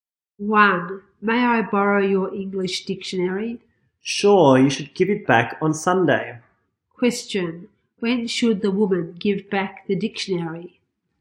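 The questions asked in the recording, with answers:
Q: When should the woman give back the dictionary?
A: On Sunday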